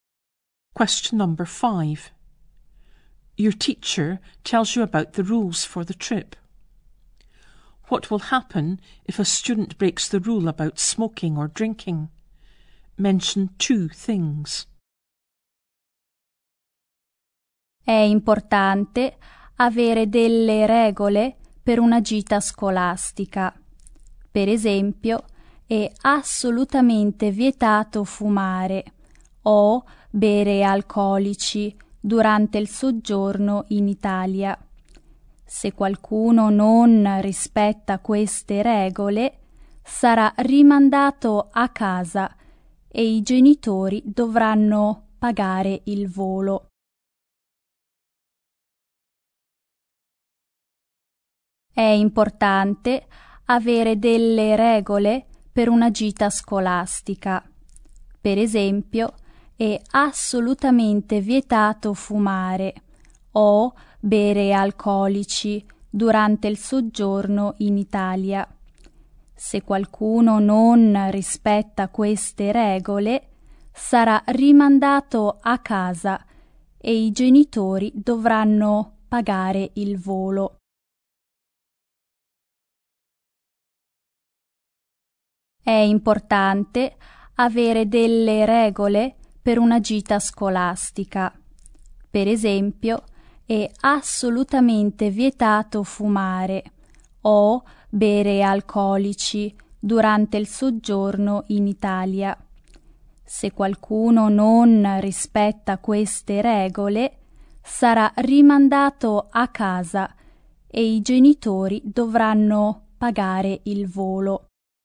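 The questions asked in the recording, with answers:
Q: What will happen if a student breaks the rule about smoking or drinking?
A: They will be sent home and their parents will have to pay for the flight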